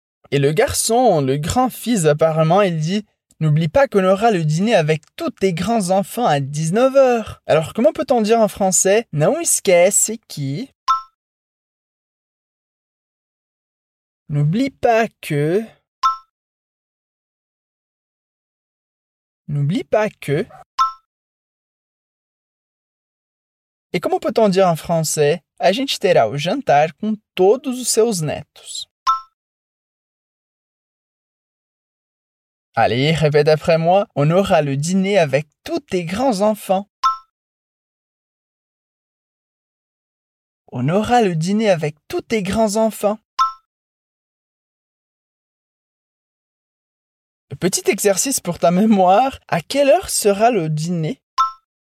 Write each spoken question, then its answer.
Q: À quelle heure sera le dîner ?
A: À 19h.